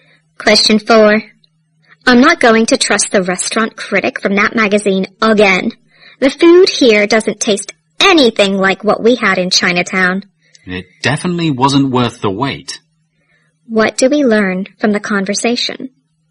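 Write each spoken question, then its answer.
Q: What do we learn from the conversation?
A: The speakers are disappointed with the restaurant, which the magazine critic had recommended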